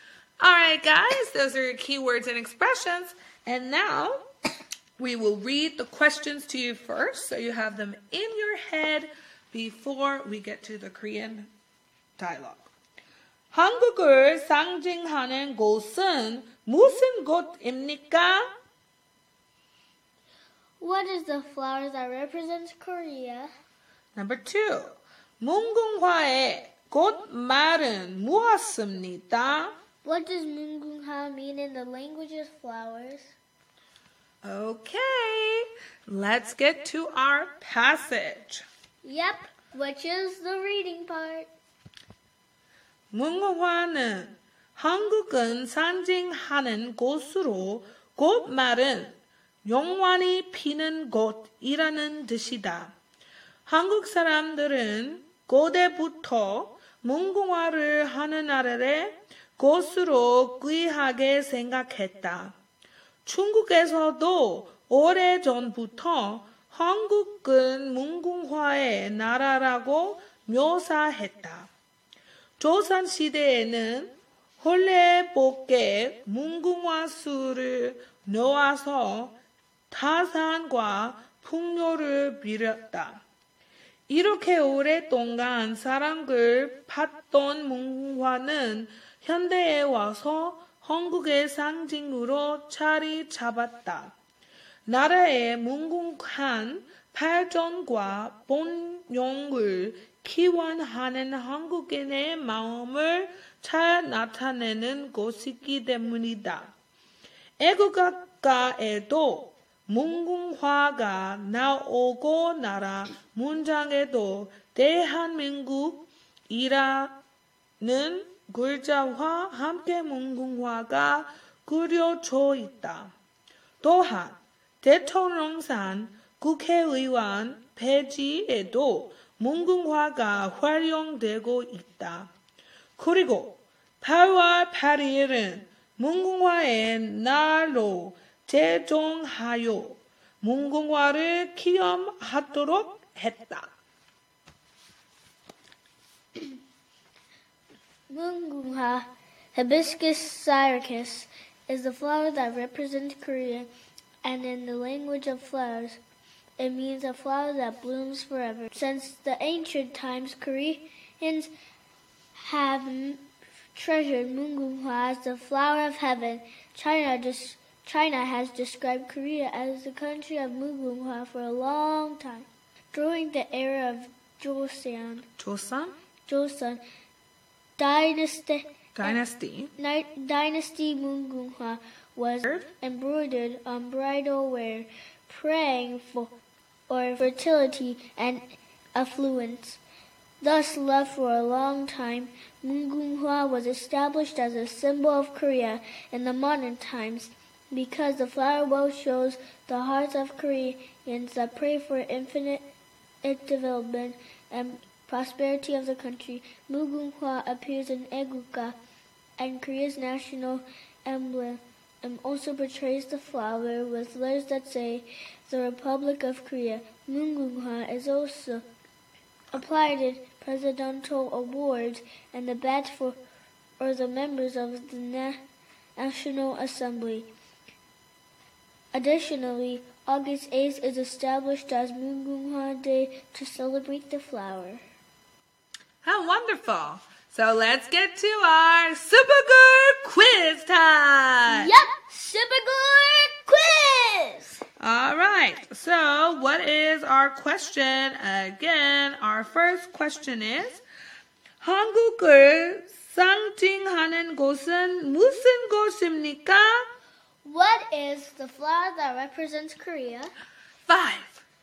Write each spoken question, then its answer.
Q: 한국을 상징하는 곳은 무슨 곳입니까?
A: And the answer is Mungunghwa.

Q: 문궁화의 꽃말은 무엇입니까?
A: a flower that blooms forever.